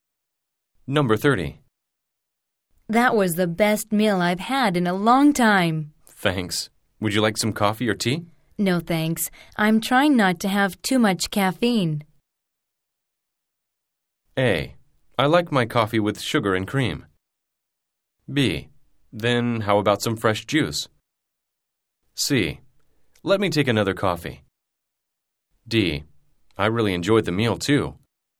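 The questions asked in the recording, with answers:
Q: No, thanks. I'm trying not to have too much caffeine.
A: B: Then how about some fresh juice?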